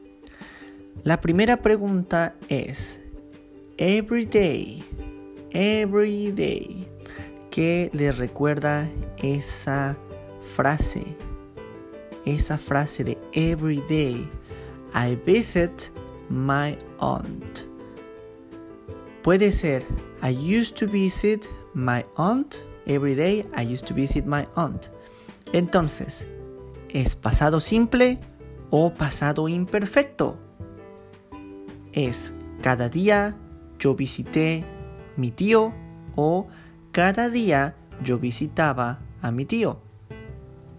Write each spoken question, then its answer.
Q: Entonces, ¿es pasado simple o pasado imperfecto?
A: La respuesta es pasado imperfecto